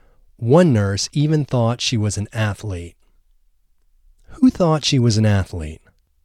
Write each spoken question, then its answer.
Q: Who thought she was an athlete?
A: One nurse thought she was an athlete.